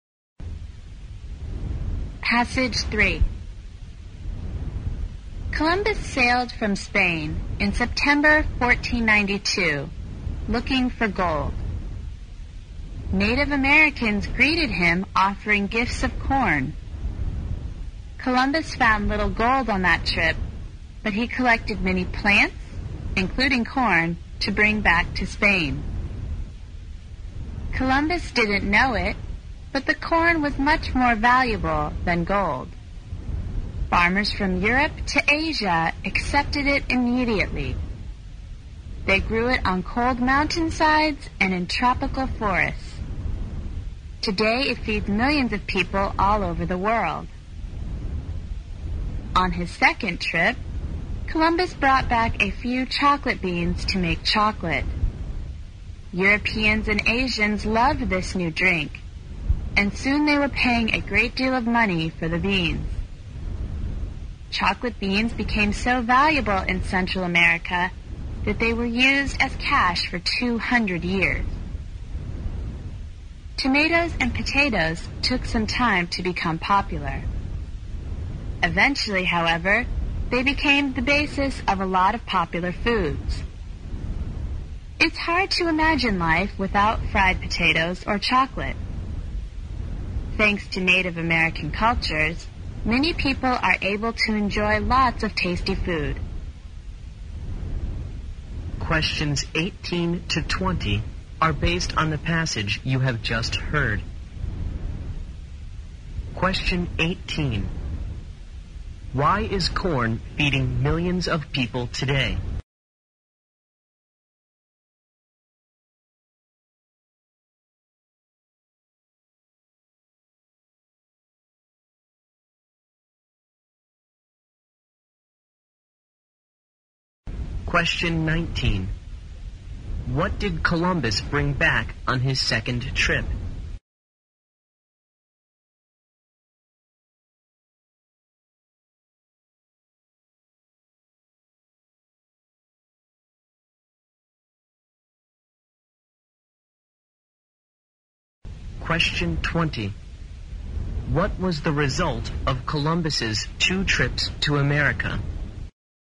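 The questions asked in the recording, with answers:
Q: What did Columbus bring back on his second trip?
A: Chocolate beans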